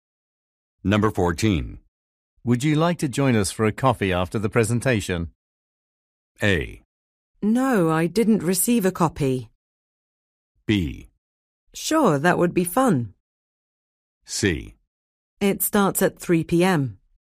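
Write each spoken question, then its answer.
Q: Would you like to join us for a coffee after the presentation?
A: B: Sure, that would be fun.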